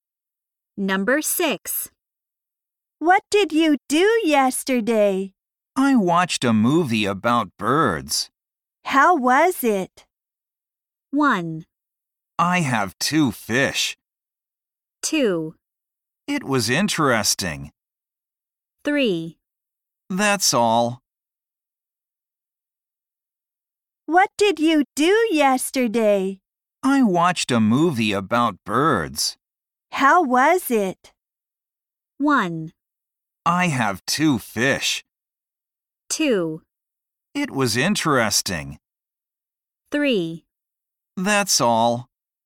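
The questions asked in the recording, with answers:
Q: How was it?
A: 2: It was interesting.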